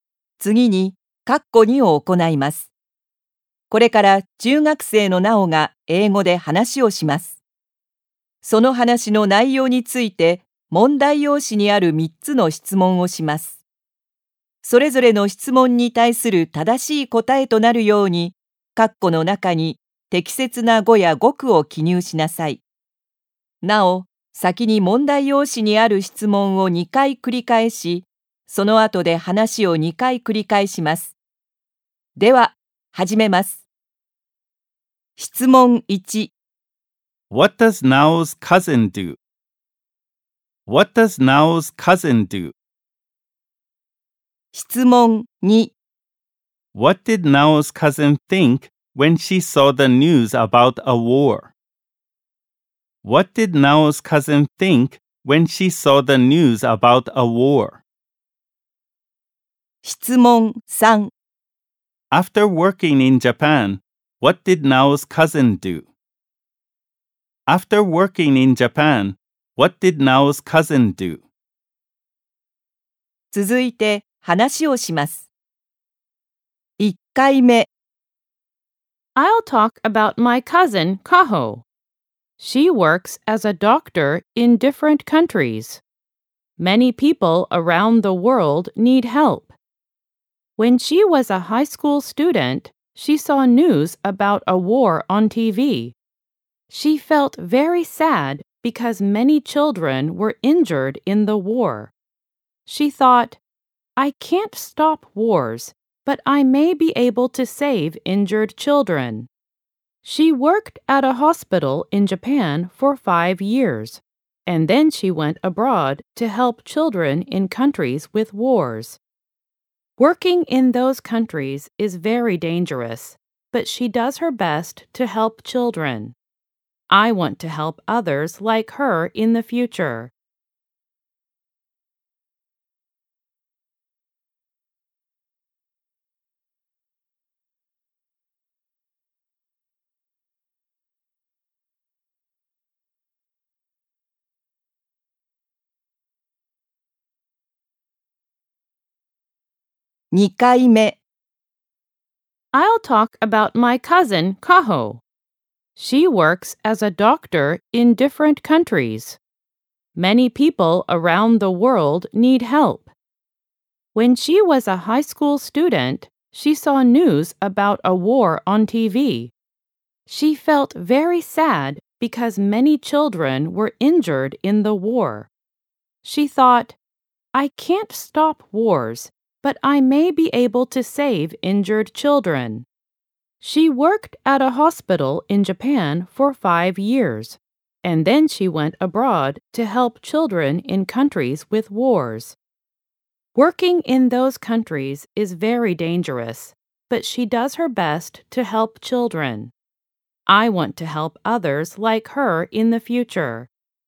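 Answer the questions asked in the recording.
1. She works as a doctor in different countries
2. She can't stop wars, but she may be able to save injured children
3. She went abroad to help children in countries with wars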